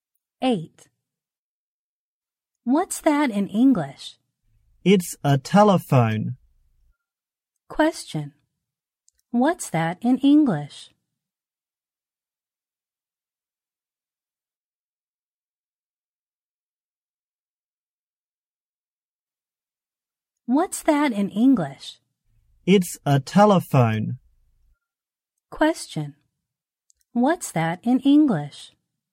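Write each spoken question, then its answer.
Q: What's that in English?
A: A telephone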